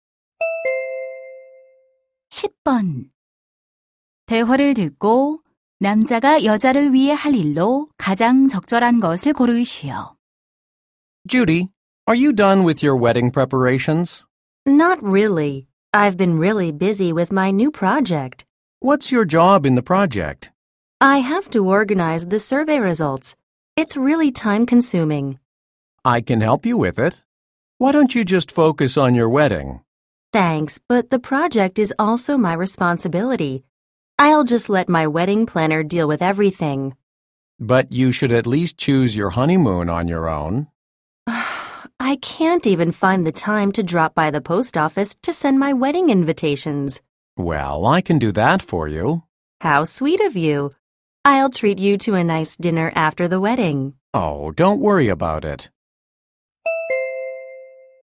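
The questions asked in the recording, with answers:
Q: 대화를 듣고 남자가 여자를 위해 할 일로 가장 적절한 것을 고르시오.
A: 우체국에 가서 청첩장 부치기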